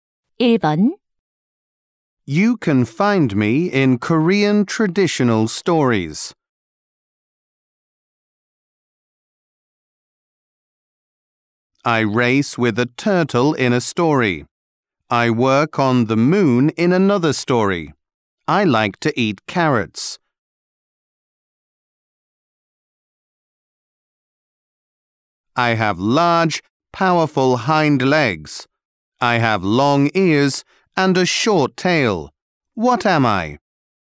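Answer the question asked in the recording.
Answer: A rabbit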